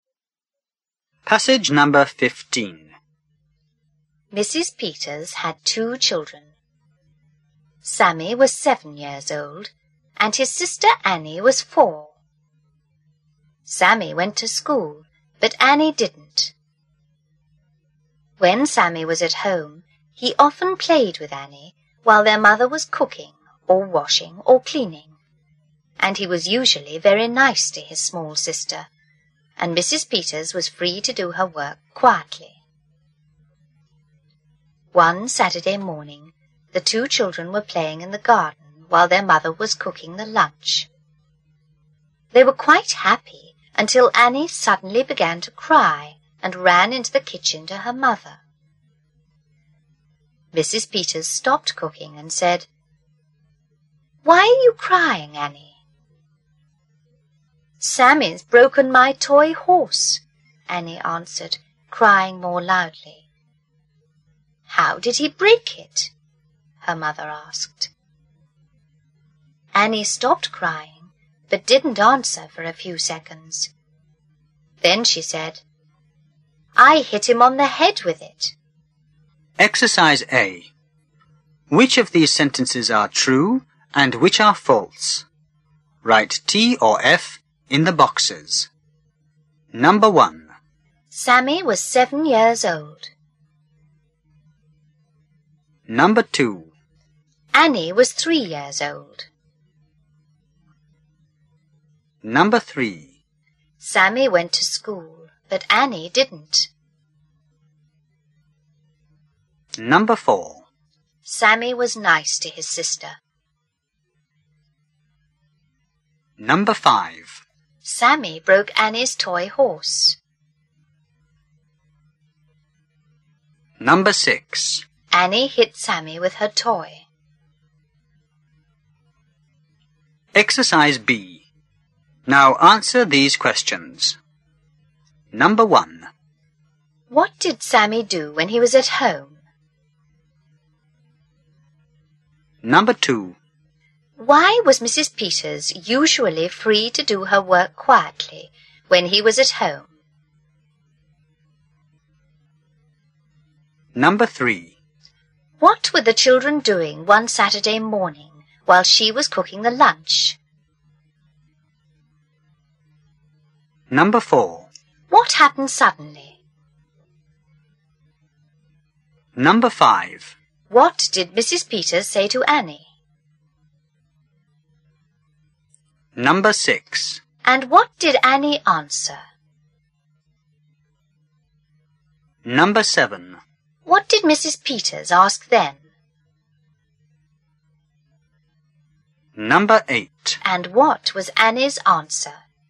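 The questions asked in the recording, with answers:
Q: Sammy was 7 years old.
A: True

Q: Annie was 3 years old.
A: False

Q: Sammy went to school, but Annie didn't.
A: True

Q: Sammy was nice to his sister.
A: True

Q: Annie hit Sammy with her toy.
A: True

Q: What did Sammy do when he was at home?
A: He often played with Annie.

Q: Why was Mrs. Peters usually free to do her work quietly when he was at home?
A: Because he was usually very nice to his small sister.

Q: What were the children doing one Saturday morning while she was cooking the lunch?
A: Playing in the garden.

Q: What happened suddenly?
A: Annie began to cry and ran into the kitchen to her mother.

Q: What did Mrs. Peters say to Annie?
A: "Why are you crying, Annie?"

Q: And what did Annie answer?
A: "Sammy's broken my toy horse."

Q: What did Mrs. Peters ask then?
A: "How did he break it?"

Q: And what was Annie's answer?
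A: "I hit him on the head with it."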